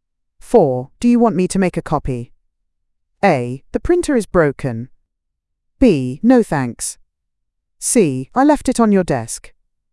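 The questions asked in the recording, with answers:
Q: Do you want me to make a copy?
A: B: No thanks.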